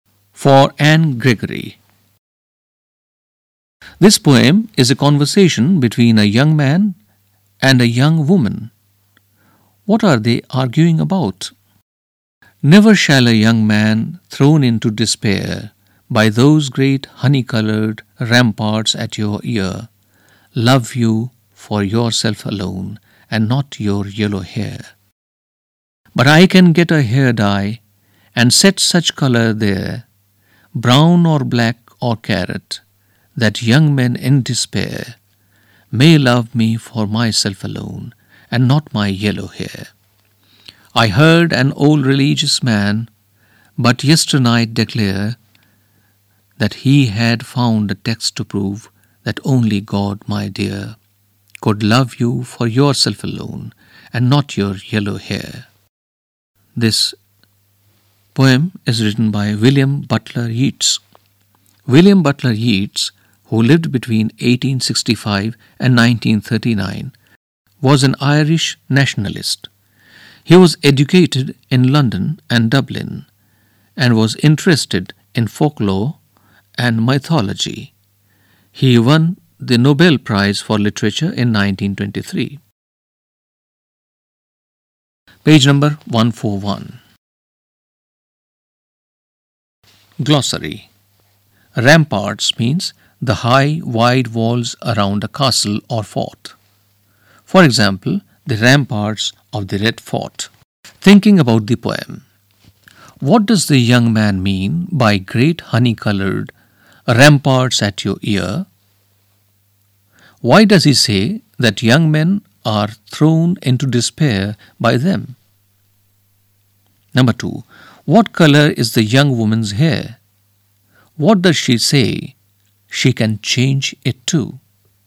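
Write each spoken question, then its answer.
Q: What color is the young woman's hair?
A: Yellow

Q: What does she say she can change it to?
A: Brown, black or carrot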